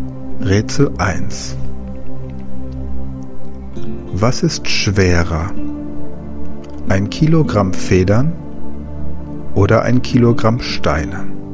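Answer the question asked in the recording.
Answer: Beide sind gleich schwer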